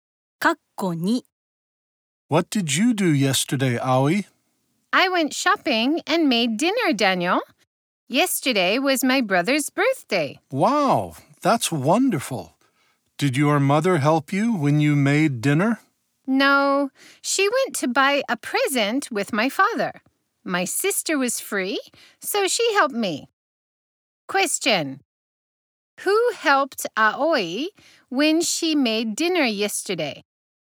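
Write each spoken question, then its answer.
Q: Question. Who helped Aoi when she made dinner yesterday?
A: Her sister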